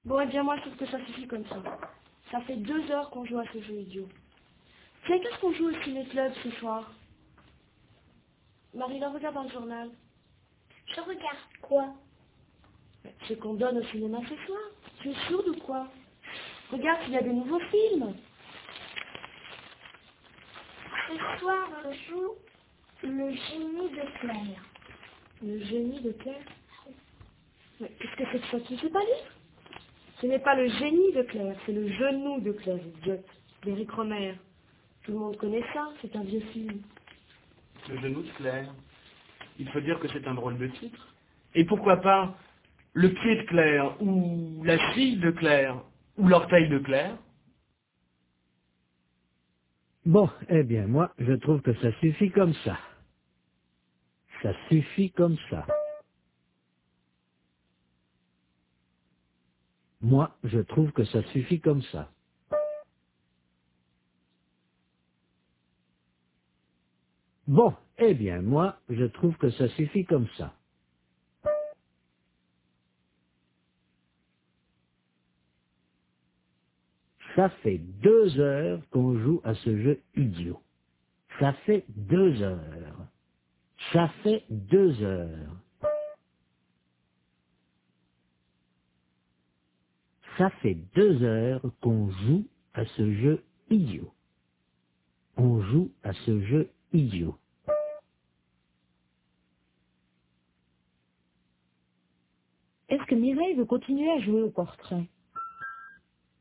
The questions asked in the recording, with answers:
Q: Est-ce que Mireille veut continuer à jouer au portrait?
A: Non, elle trouve que ça suffit comme ça.